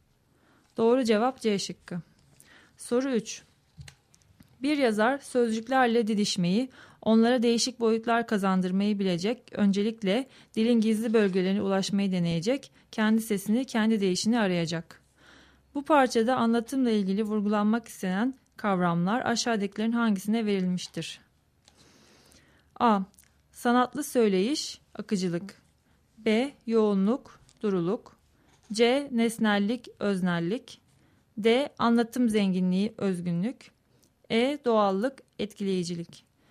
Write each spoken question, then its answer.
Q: Bu parçada anlatımla ilgili vurgulanmak istenen kavramlar aşağıdakilerin hangisine verilmiştir?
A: Doğru cevap D şıkkı.